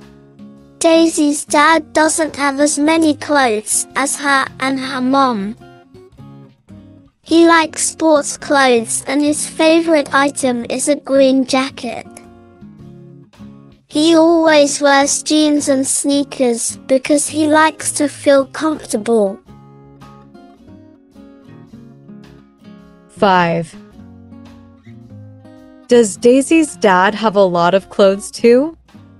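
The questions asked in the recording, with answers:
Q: Does Daisy's dad have a lot of clothes too?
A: No, he doesn't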